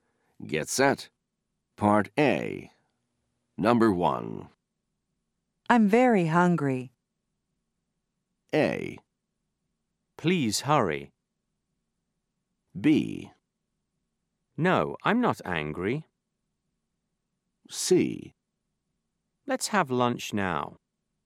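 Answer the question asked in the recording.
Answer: C: Let's have lunch now.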